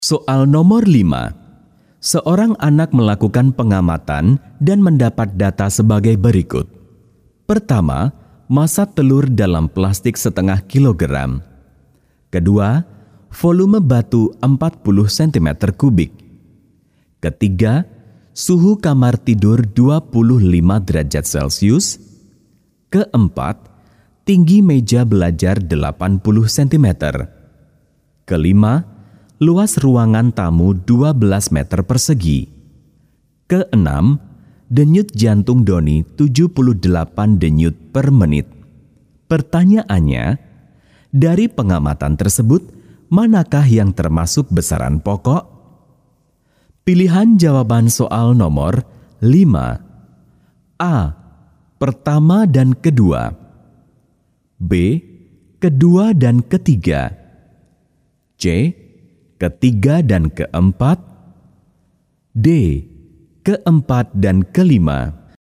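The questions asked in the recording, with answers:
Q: Pertanyaannya, dari pengamatan tersebut, manakah yang termasuk besaran pokok?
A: C: Ketiga dan keempat.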